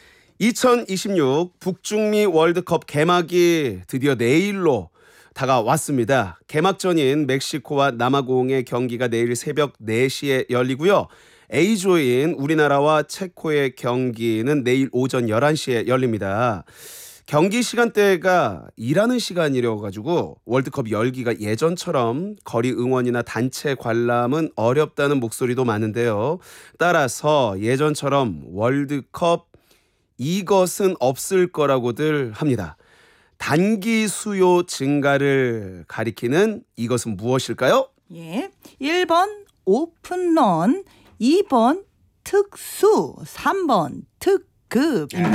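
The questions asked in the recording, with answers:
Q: 단기 수요 증가를 가리키는 이것은 무엇일까요?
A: 2: 특수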